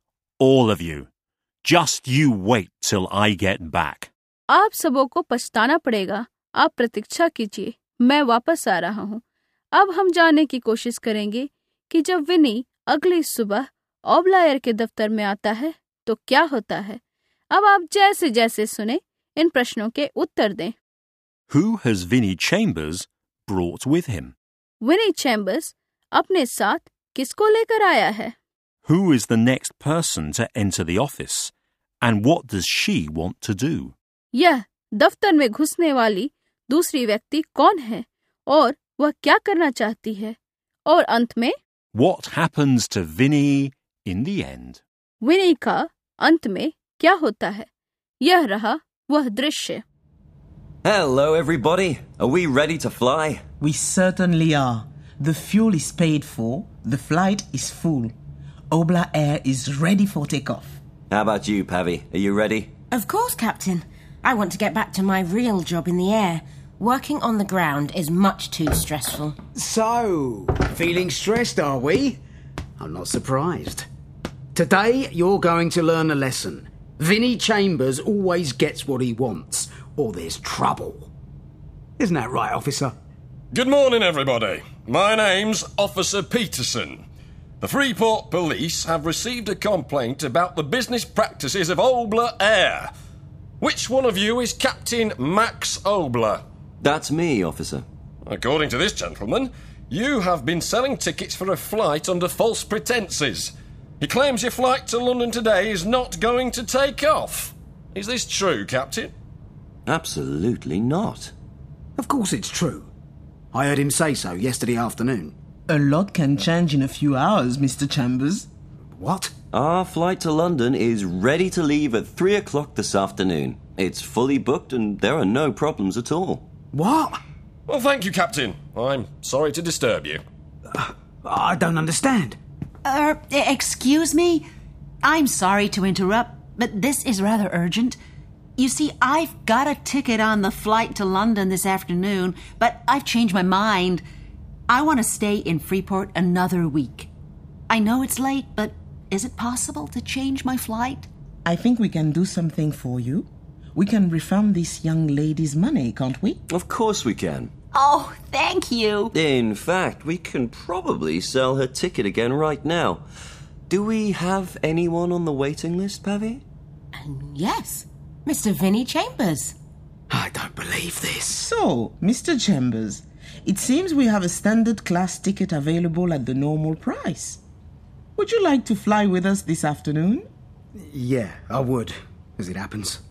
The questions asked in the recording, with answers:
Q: Who has Vinnie Chambers brought with him?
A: A police officer.

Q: What happens to Vinnie In the end,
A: He gets a ticket for the flight to London.